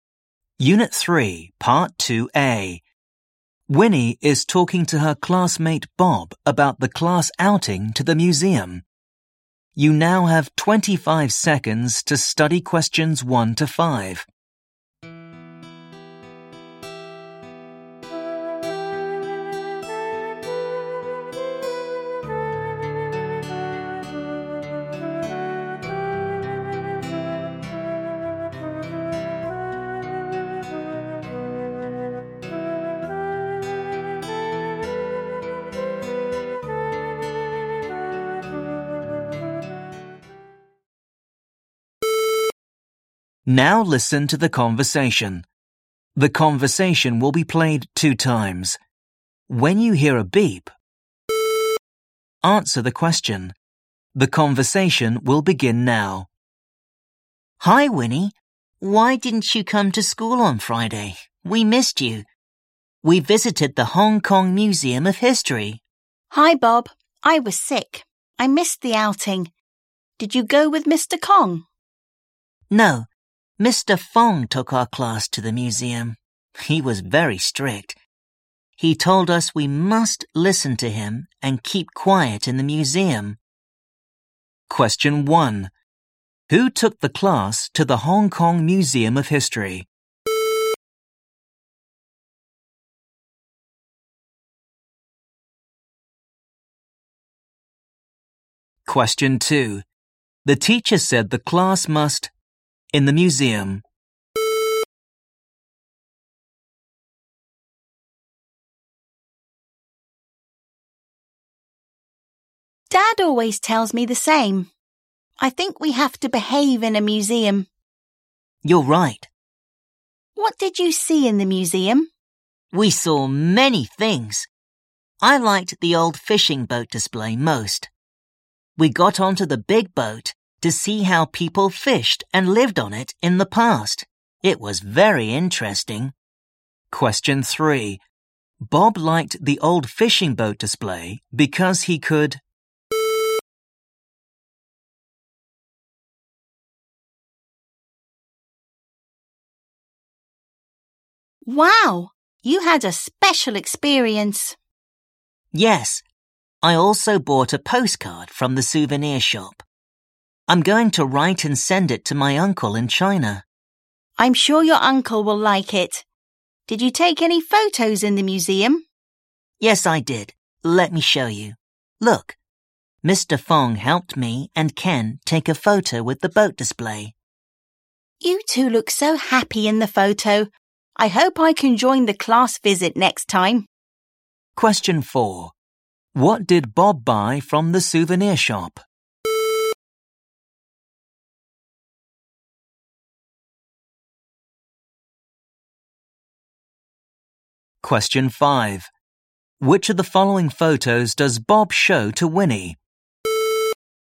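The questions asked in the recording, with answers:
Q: Who took the class to the Hong Kong Museum of History?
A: Mr. Fong

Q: The teacher said the class must...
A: listen to him and keep quiet in the museum

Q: Bob liked the old fishing boat display because he could...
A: get onto the big boat to see how people fished and lived on it in the past

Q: What did Bob buy from the souvenir shop?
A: A postcard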